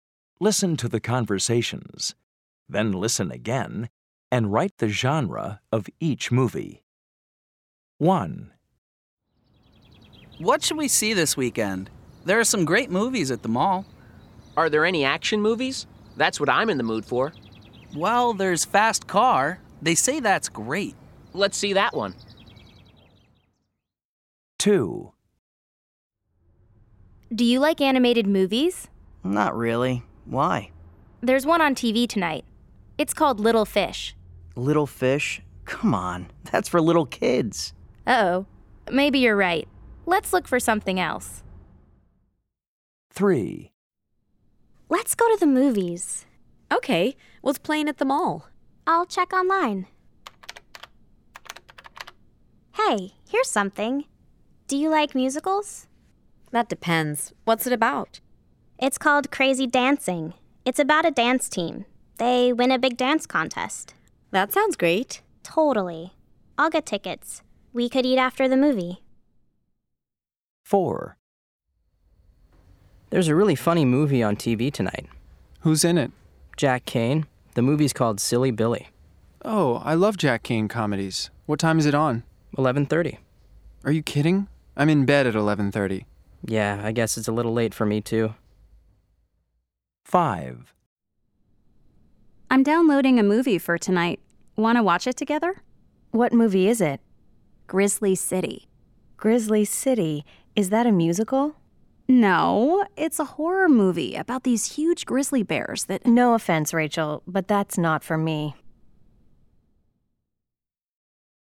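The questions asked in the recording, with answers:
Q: Then listen again and write the genre of each movie.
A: action

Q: Then listen again and write the genre of each movie.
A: animated

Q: Then listen again and write the genre of each movie.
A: musical

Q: Then listen again and write the genre of each movie.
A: comedy

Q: Then listen again and write the genre of each movie.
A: horror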